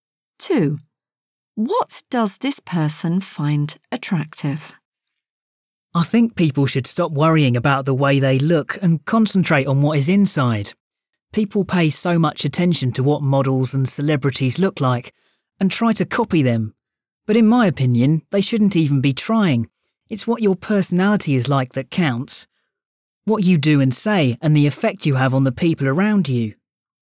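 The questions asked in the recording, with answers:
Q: What does this person find attractive?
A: personality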